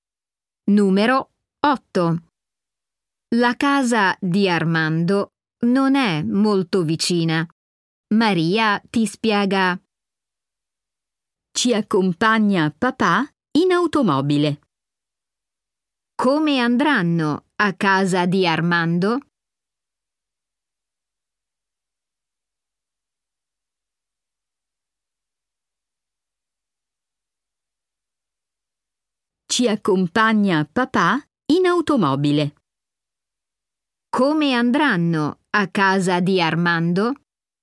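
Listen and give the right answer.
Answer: In automobile, li accompagna papà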